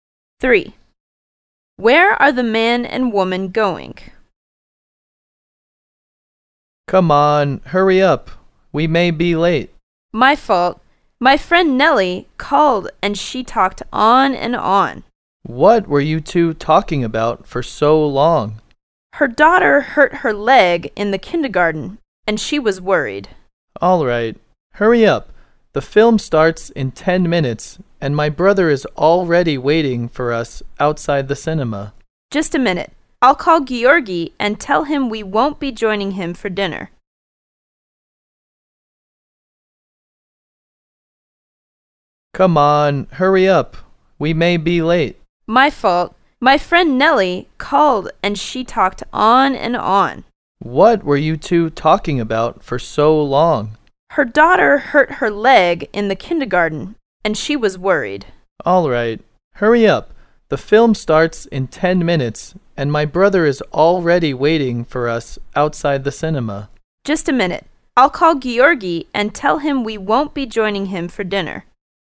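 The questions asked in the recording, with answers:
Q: Where are the man and woman going?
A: To the cinema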